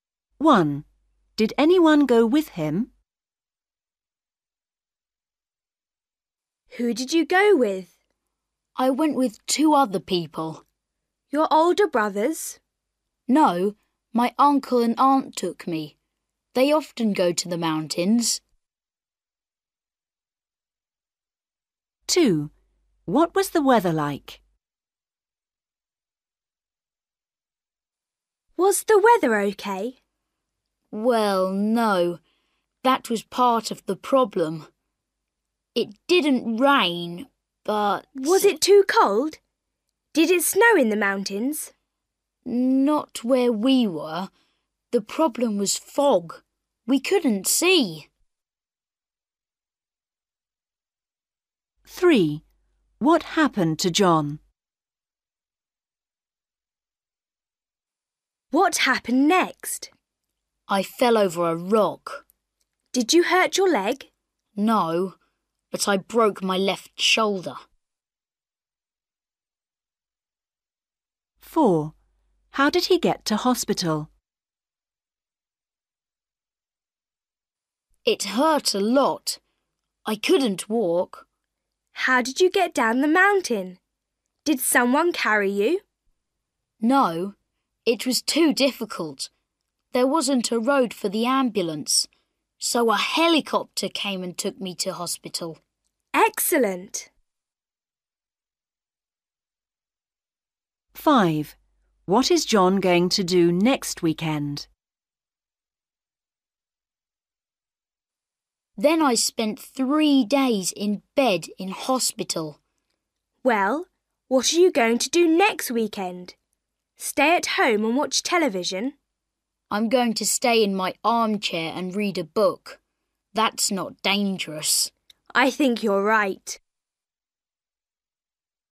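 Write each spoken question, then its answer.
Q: Did anyone go with him?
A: Yes, his uncle and aunt

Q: What was the weather like?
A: Foggy

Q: What happened to John?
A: He fell over a rock and broke his left shoulder

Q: How did he get to hospital?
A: By helicopter

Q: What is John going to do next weekend?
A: Stay in his armchair and read a book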